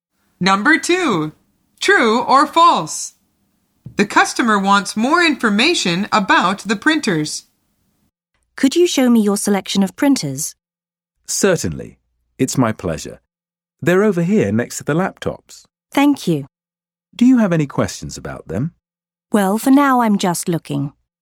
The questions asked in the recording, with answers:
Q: True or false? The customer wants more information about the printers.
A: The answer is false. The customer says, I'm just looking.